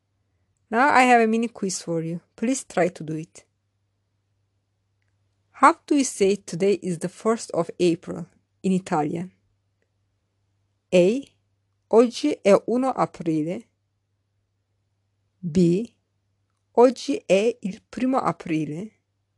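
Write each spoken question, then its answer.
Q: How do you say today is the 1st of April in Italian?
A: B: Oggi è il 1 aprile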